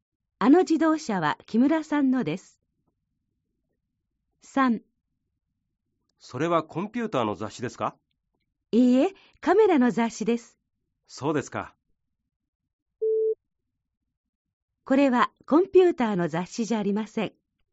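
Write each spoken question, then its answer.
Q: これはコンピューターの雑誌じゃありません。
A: ○(カメラの雑誌です)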